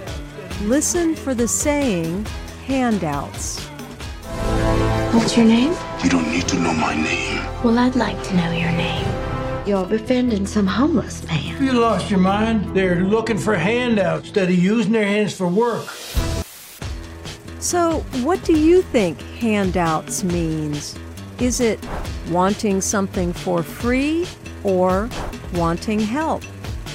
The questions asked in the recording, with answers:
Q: So, what do you think handouts means?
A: Asking for a handout means wanting something for free.